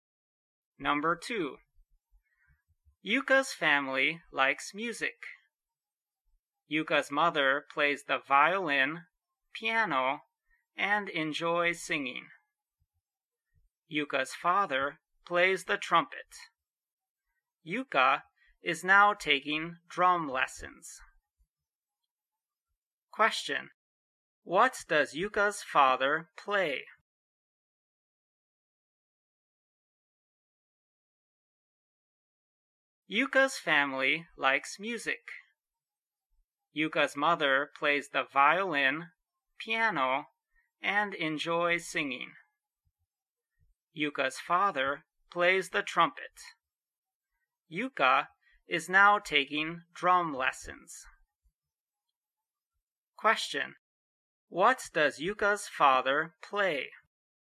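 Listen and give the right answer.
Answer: The trumpet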